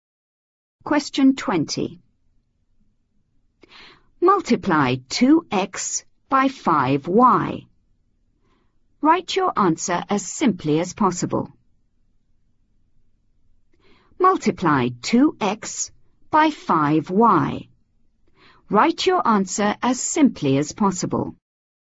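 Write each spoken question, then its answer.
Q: Multiply 2x by 5y. Write your answer as simply as possible.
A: 10xy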